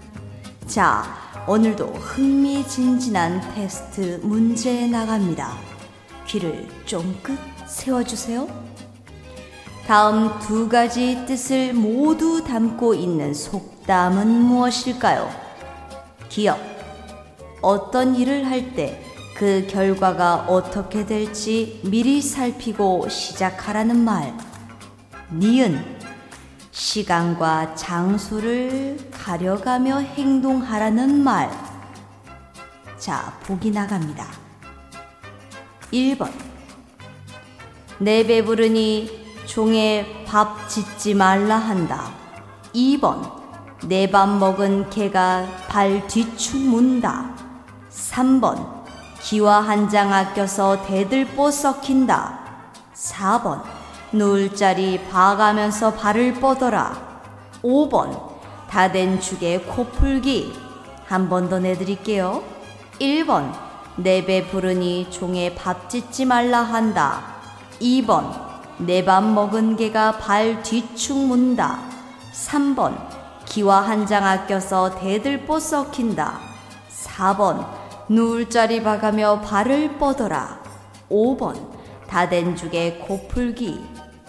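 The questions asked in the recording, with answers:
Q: 다음 두 가지 뜻을 모두 담고 있는 속담은 무엇일까요?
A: 4: 누울 자리 봐가며 발을 뻗어라.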